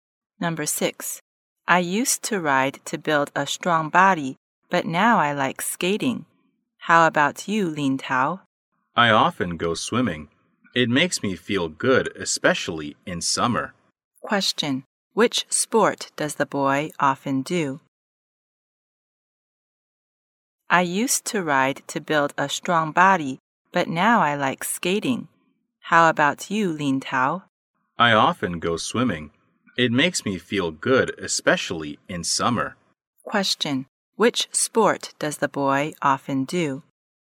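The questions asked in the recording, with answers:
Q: Which sport does the boy often do?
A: Swimming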